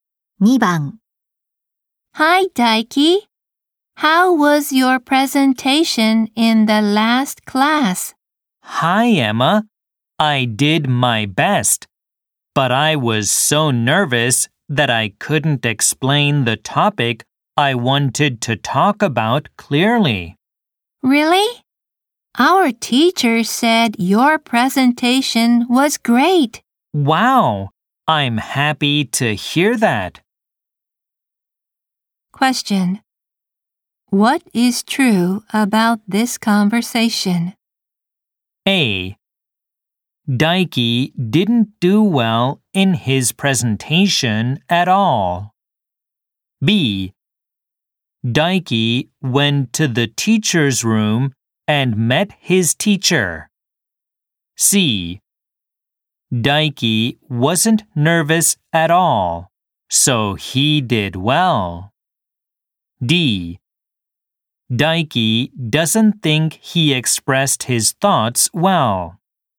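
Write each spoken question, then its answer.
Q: Question. What is true about this conversation?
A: D: Daiki doesn't think he expressed his thoughts well.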